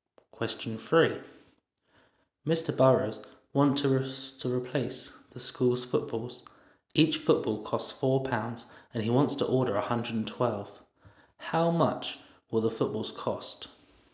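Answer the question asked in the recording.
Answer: £448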